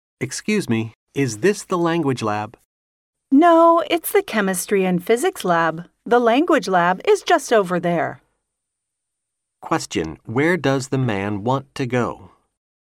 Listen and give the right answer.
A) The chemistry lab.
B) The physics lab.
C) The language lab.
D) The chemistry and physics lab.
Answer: C) The language lab.

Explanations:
男士在开头向女士问路,问的是语言实验室在哪,故正确答案为C。

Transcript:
M: Excuse me, is this the language lab?
W: No. It's the chemistry and physics lab. The language lab is just over there.
Question: Where does the man want to go?